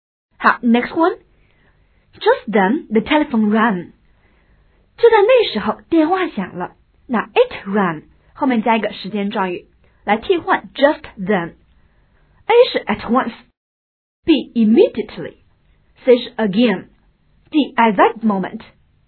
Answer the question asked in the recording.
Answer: 答案选择是 D at that moment 来替换 just then